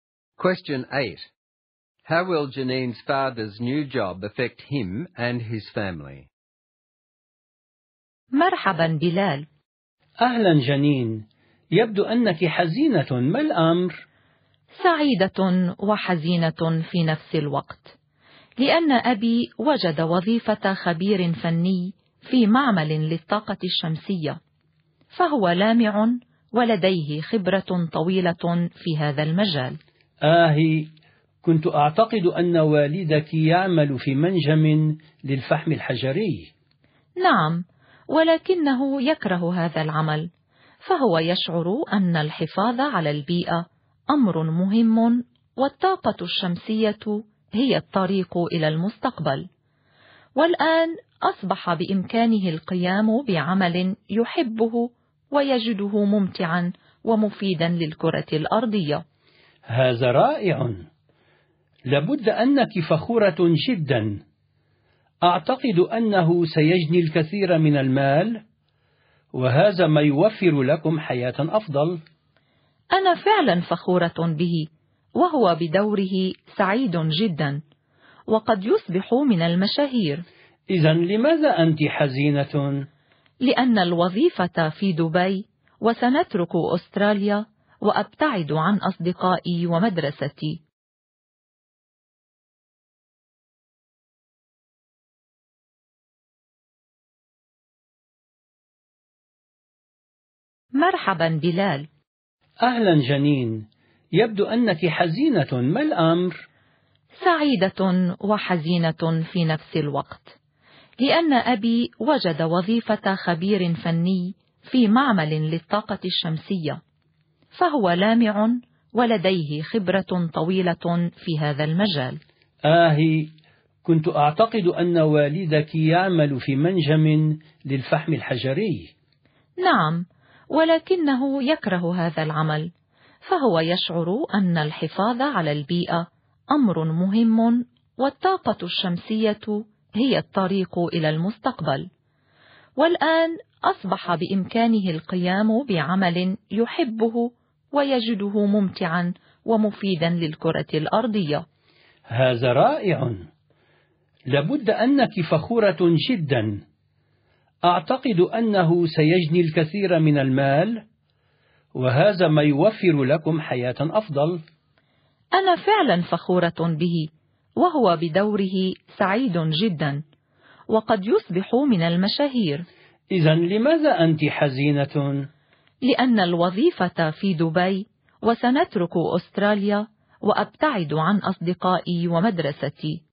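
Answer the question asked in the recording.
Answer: He will do work he loves at a solar energy plant, earn more money and maybe become famous, but the family must move to Dubai and Janine will leave her friends and school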